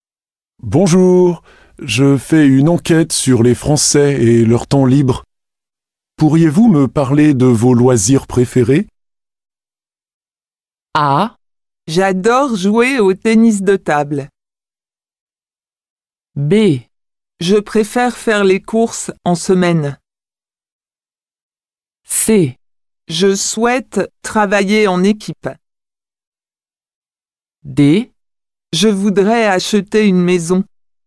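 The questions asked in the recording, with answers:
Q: Pourriez-vous me parler de vos loisirs préférés?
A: A: J'adore jouer au tennis de table.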